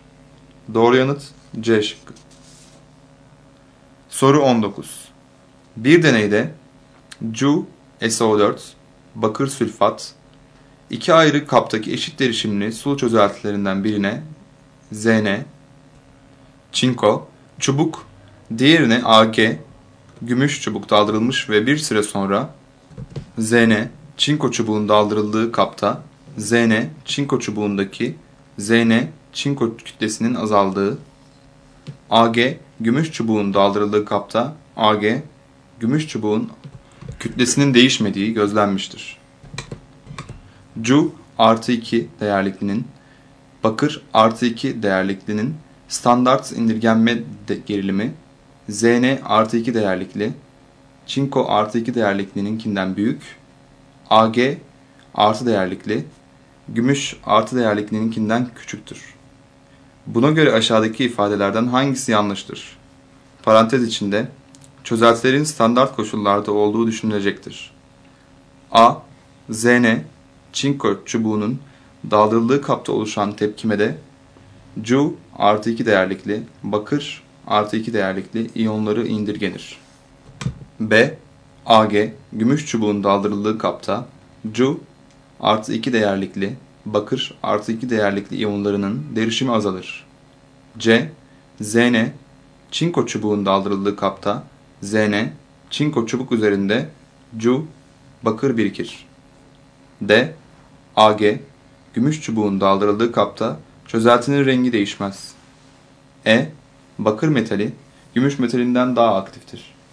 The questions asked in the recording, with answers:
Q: Buna göre aşağıdaki ifadelerden hangisi yanlıştır?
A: Doğru yanıt B şıkkı.